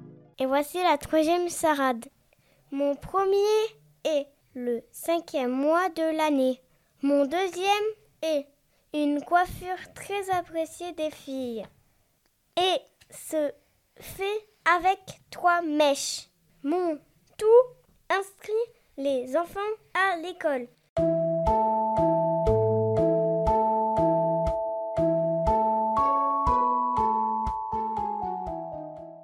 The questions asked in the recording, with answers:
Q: Mon tout inscrit les enfants à l'école.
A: Je suis une maîtresse.